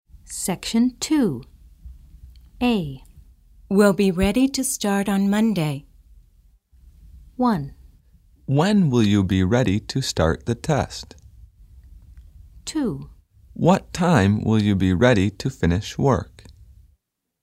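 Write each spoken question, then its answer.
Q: We'll be ready to start on Monday.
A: 1: When will you be ready to start the test?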